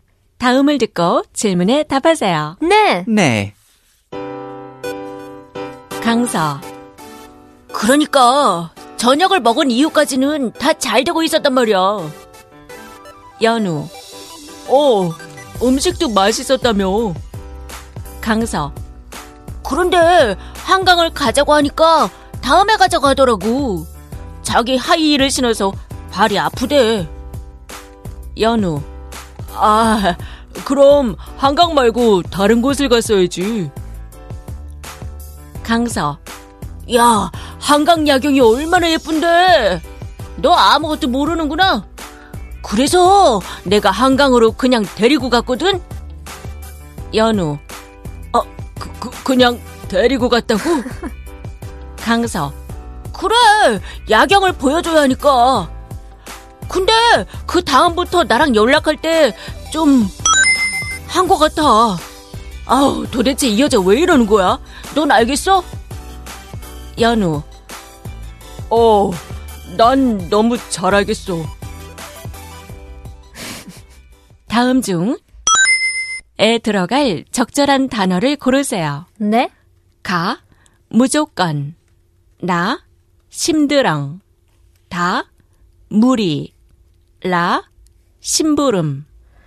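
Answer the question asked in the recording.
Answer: 나: 심드렁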